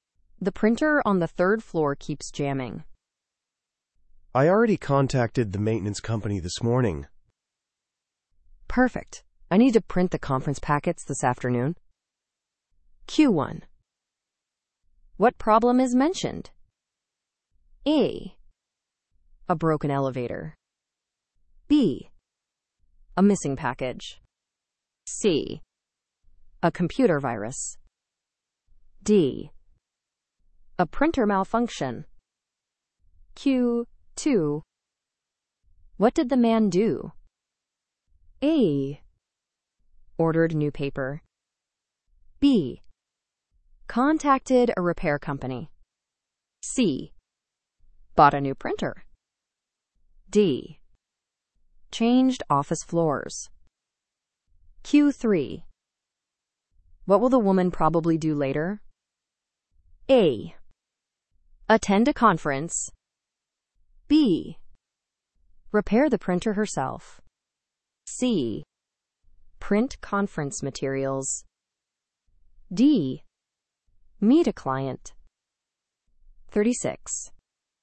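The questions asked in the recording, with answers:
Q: What problem is mentioned?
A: D: A printer malfunction.

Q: What did the man do?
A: B: Contacted a repair company.

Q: What will the woman probably do later?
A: C: Print conference materials.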